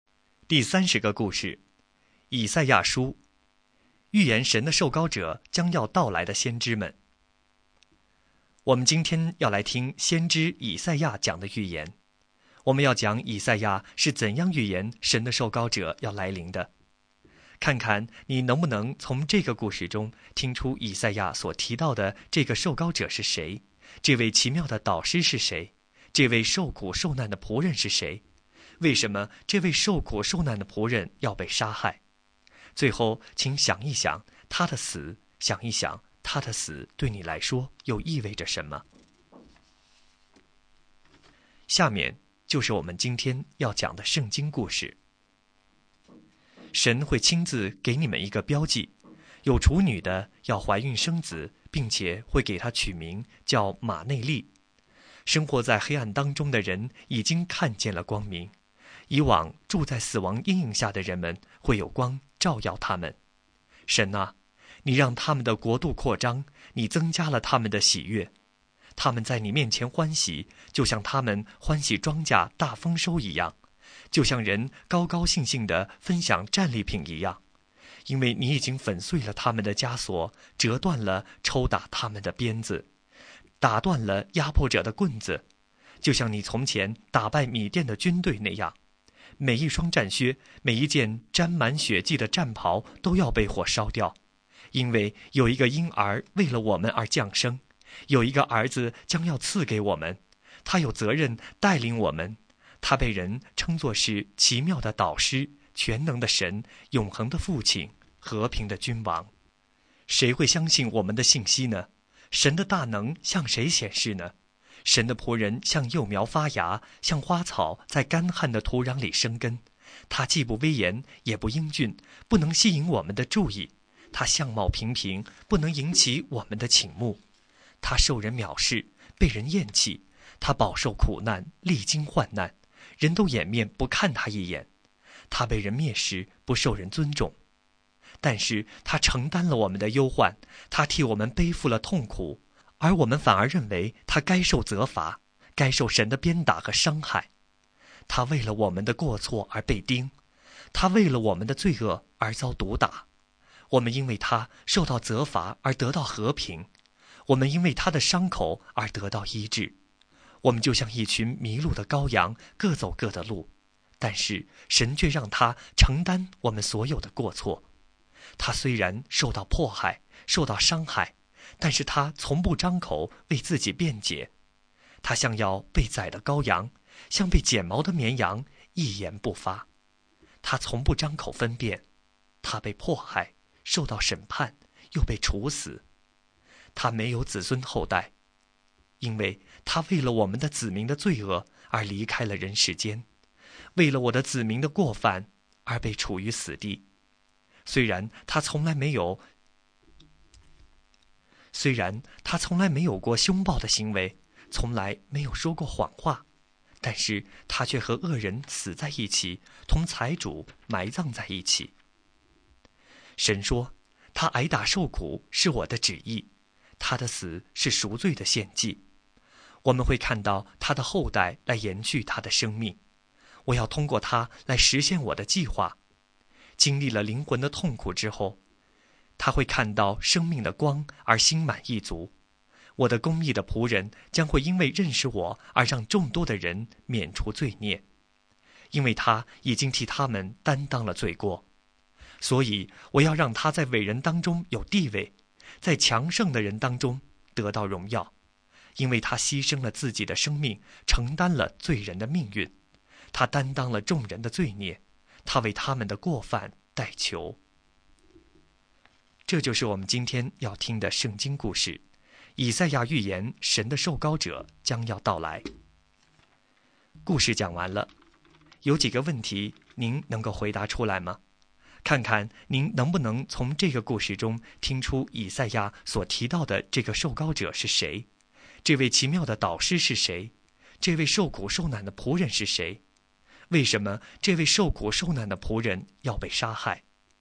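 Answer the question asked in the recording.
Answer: 为了我们的过错和罪恶,替众人担当罪孽(赎罪的献祭)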